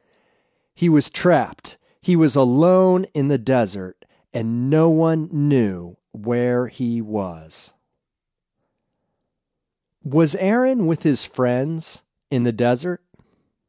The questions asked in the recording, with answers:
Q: Was Aaron with his friends in the desert?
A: No. He wasn't with his friends in the desert.